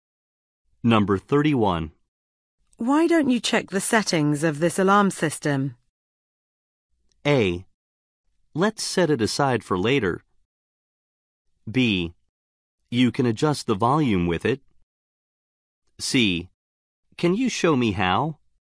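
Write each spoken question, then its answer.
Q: Why don't you check the settings of this alarm system?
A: C: Can you show me how?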